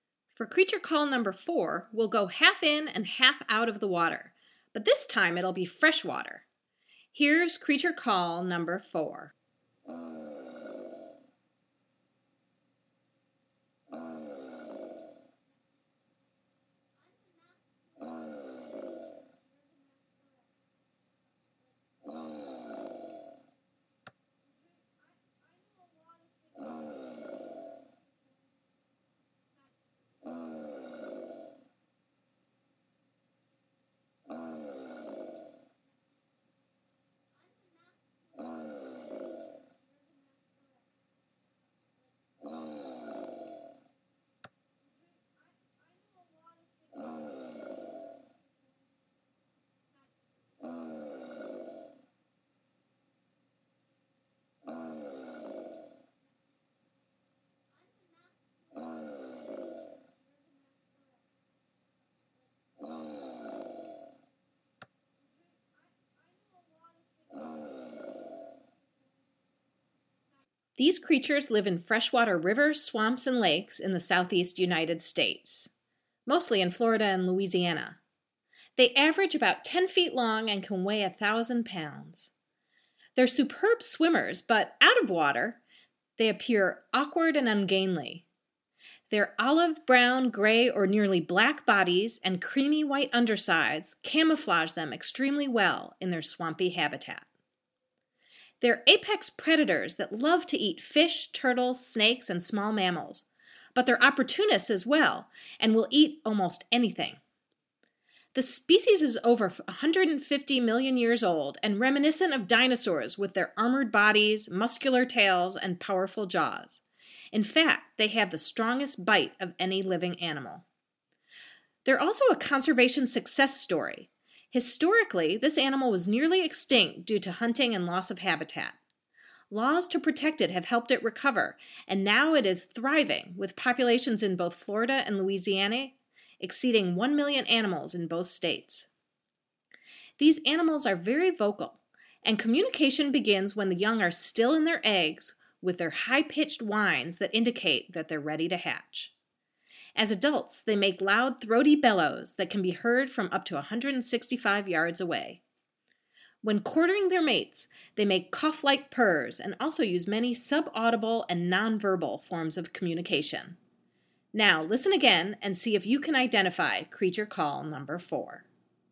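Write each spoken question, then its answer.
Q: Now, listen again and see if you can identify creature call number 4.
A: American alligator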